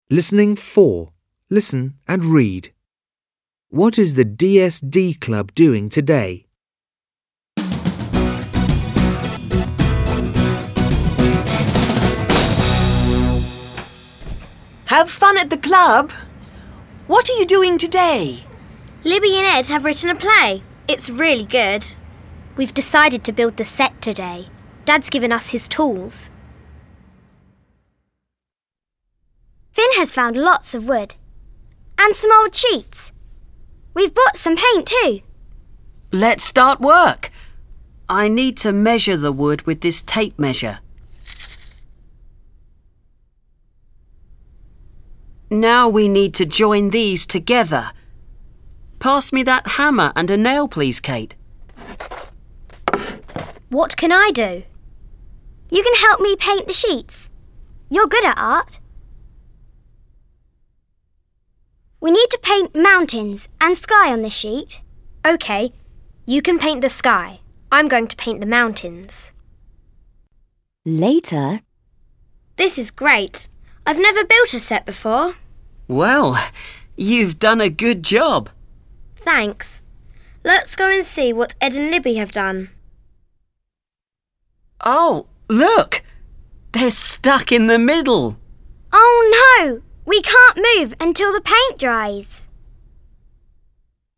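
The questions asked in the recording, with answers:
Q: What is the DSD Club doing today?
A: They are building the set for a play.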